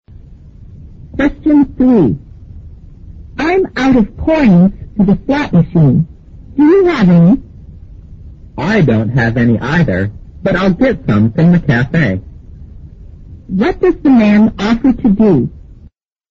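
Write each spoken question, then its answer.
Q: What does the man offer to do?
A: Get some coins from the cafe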